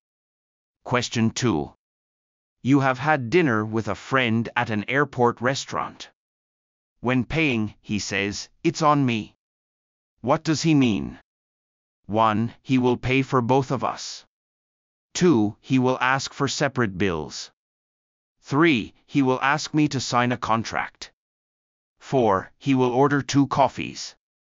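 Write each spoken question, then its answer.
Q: When paying, he says, "It's on me." What does he mean?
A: 1: He will pay for both of us.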